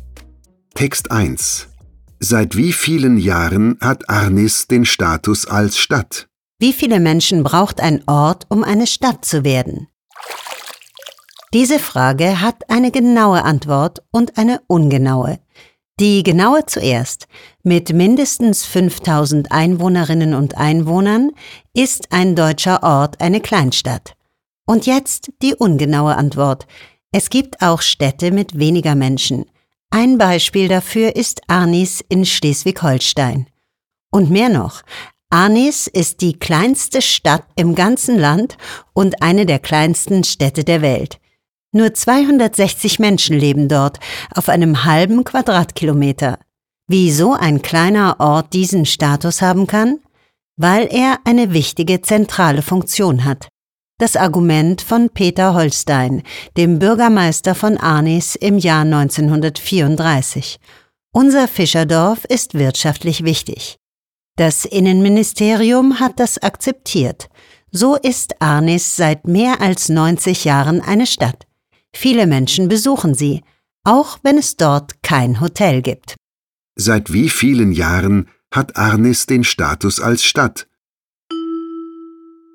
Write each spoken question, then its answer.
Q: Seit wie vielen Jahren hat Arnis den Status als Stadt?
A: Seit mehr als 90 Jahren hat Arnis in Schleswig-Holstein den Status einer Stadt.